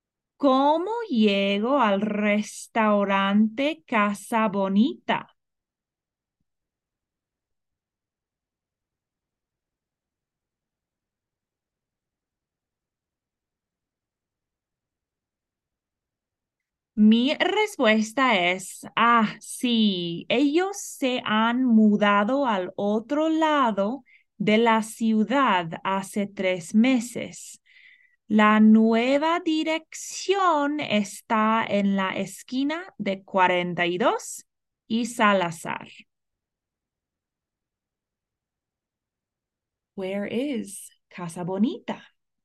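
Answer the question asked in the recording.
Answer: On the other side of the city, at the corner of 42 and Salazar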